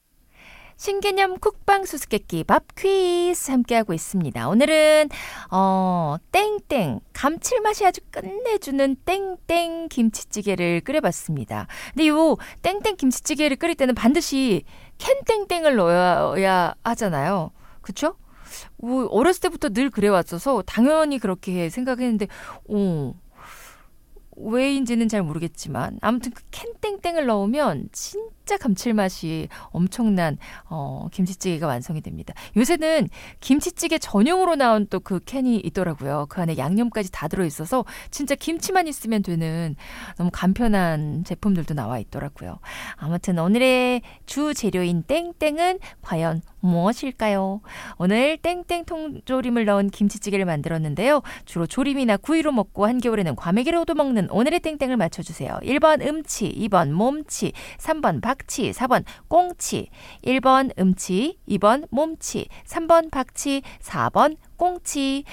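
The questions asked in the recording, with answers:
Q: 주로 조림이나 구이로 먹고 한겨울에는 과메기로도 먹는 오늘의 땡땡을 맞춰주세요.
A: 4: 꽁치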